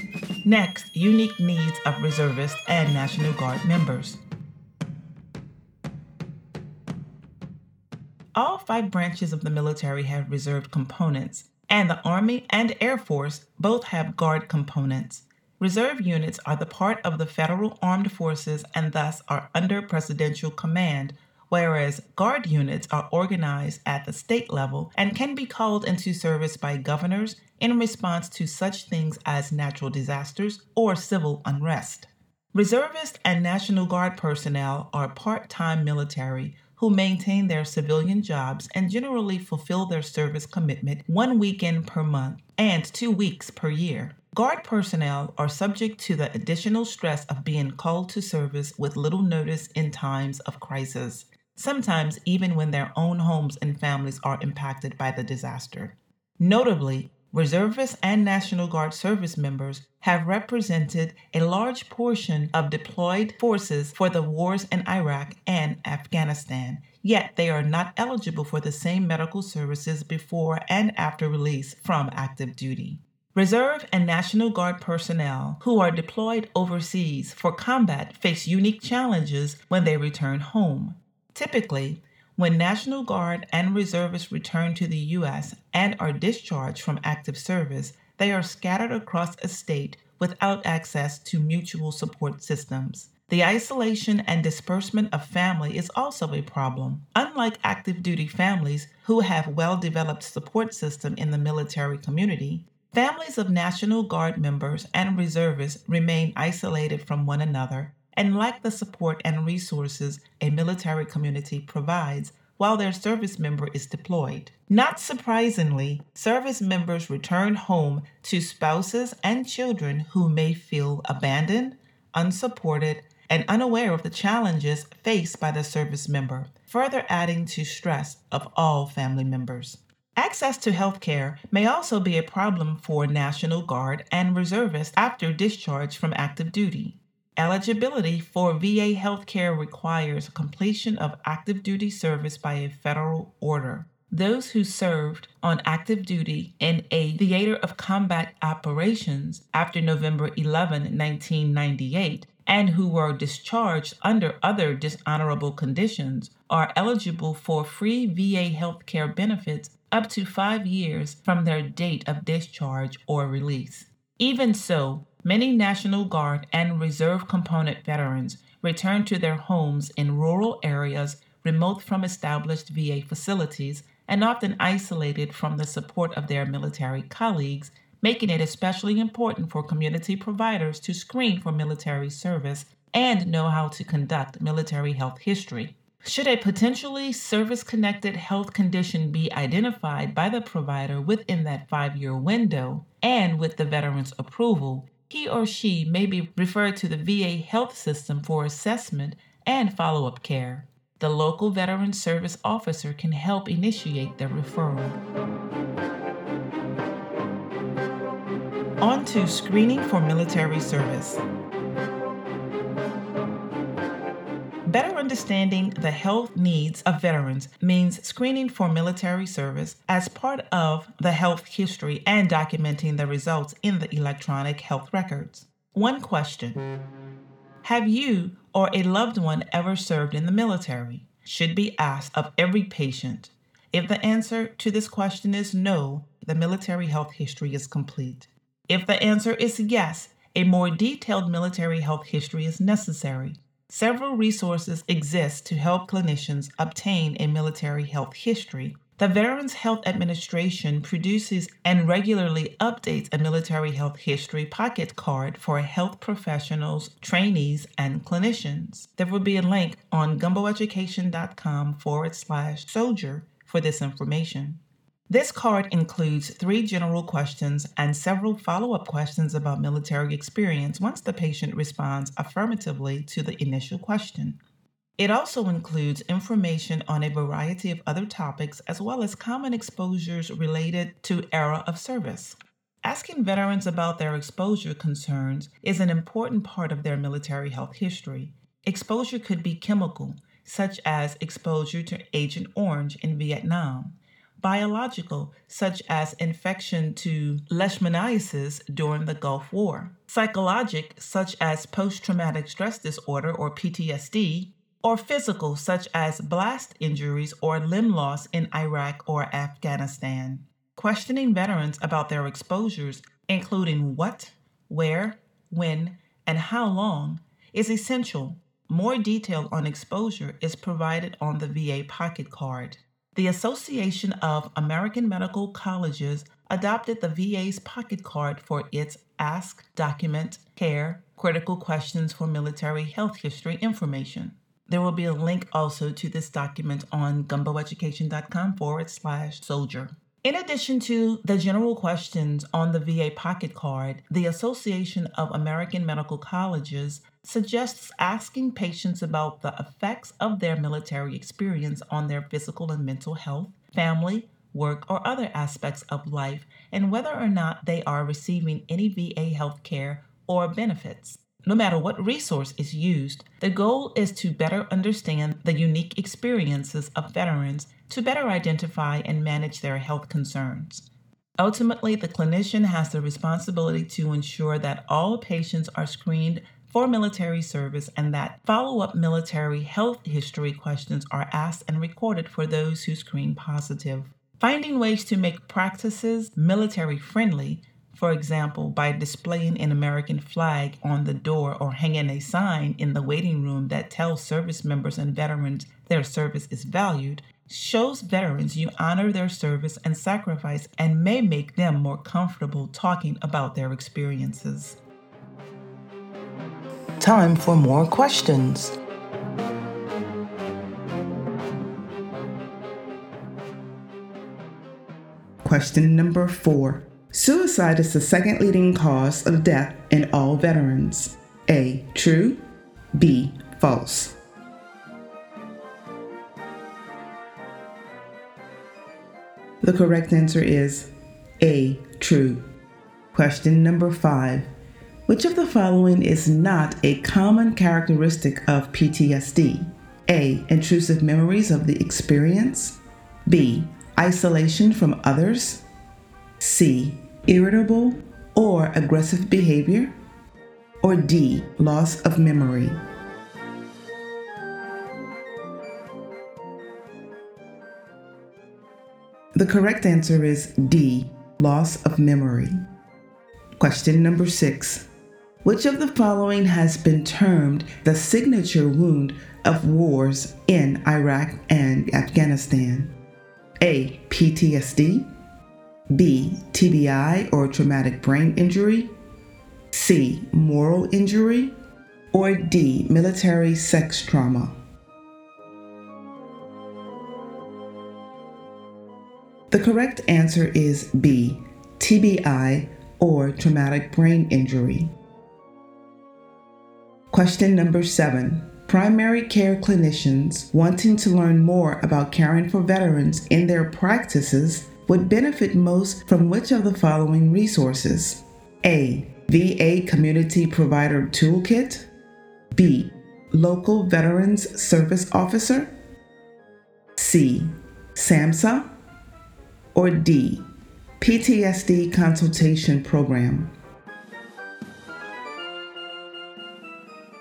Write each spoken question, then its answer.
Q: Suicide is the second leading cause of death in all veterans.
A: The correct answer is A. True.

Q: Which of the following is not a common characteristic of PTSD?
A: The correct answer is D, loss of memory.

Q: Which of the following has been termed the signature wound of wars in Iraq and Afghanistan?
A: The correct answer is B, TBI or traumatic brain injury.